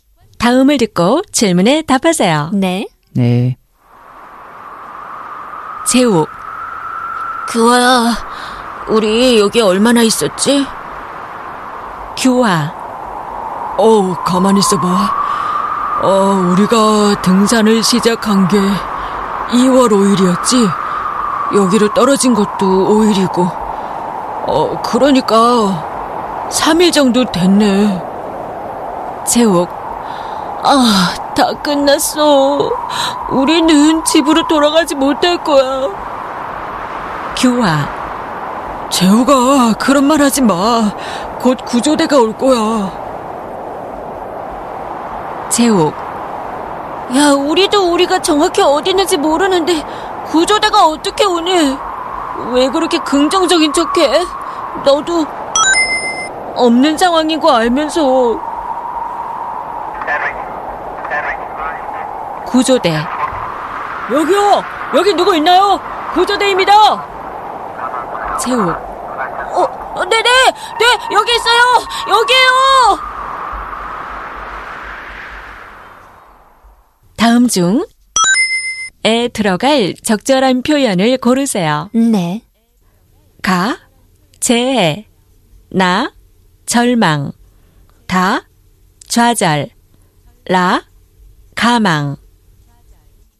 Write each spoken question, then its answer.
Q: 다음 중에 들어갈 적절한 표현을 고르세요.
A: which means 라, which we chose, 가망, 가망 없다, no hope,